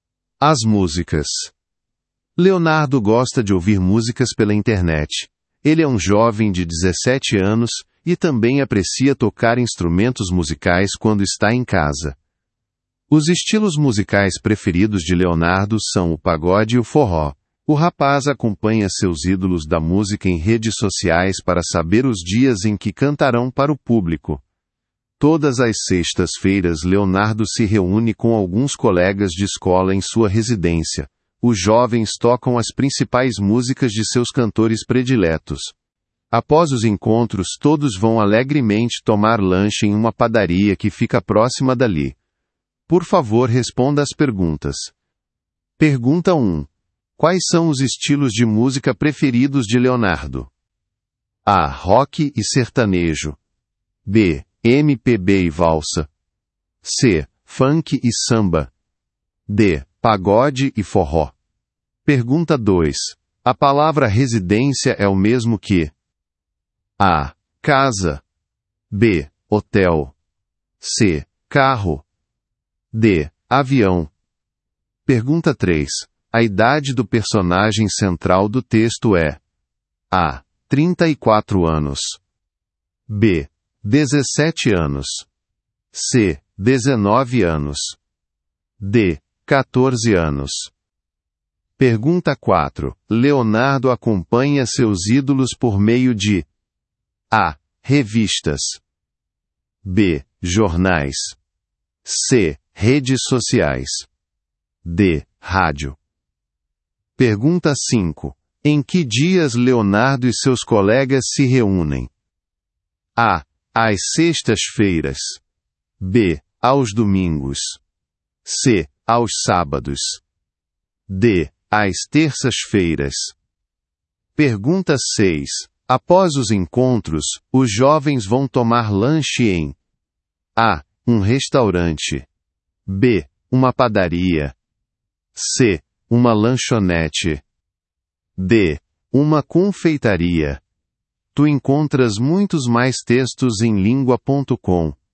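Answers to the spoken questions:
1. D: Pagode e forró
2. A: Casa
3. B: 17 anos
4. C: Redes sociais
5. A: Às sextas-feiras
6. B: Uma padaria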